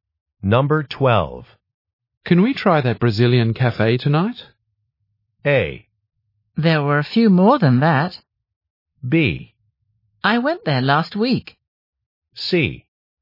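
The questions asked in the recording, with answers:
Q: Can we try that Brazilian cafe tonight?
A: B: I went there last week.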